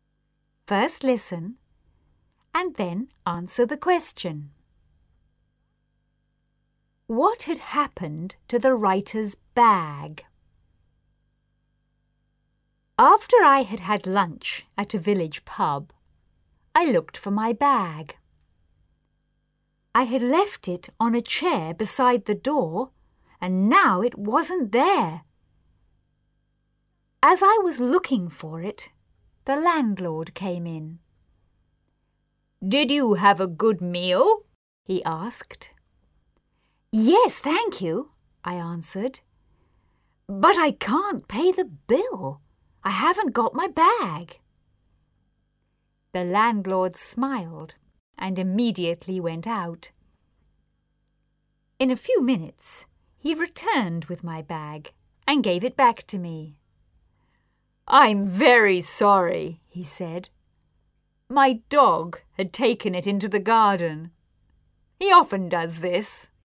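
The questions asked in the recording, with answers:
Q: What had happened to the writer's bag?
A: The landlord's dog had taken it into the garden.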